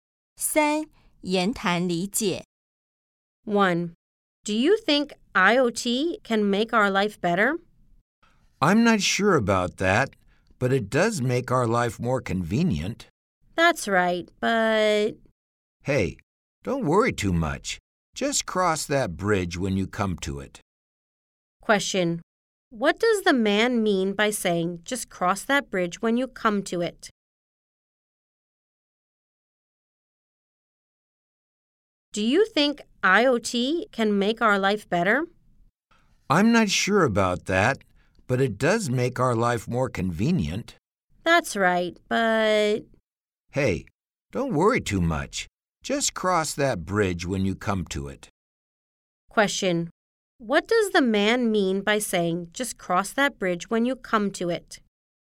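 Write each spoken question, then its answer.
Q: What does the man mean by saying, just cross that bridge when you come to it?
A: Don't worry about a problem until it actually happens.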